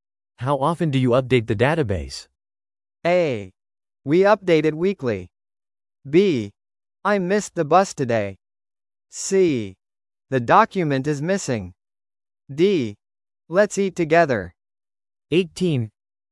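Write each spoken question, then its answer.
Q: How often do you update the database?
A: A: We update it weekly.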